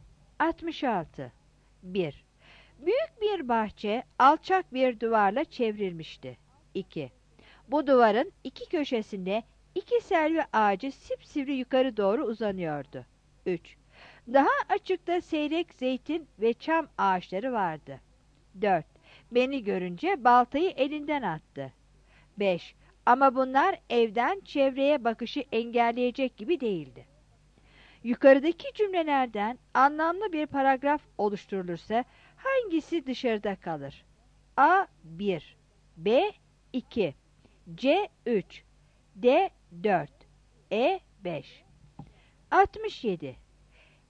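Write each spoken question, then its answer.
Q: Yukarıdaki cümlelerden anlamlı bir paragraf oluşturulursa hangisi dışarıda kalır?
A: D: 4.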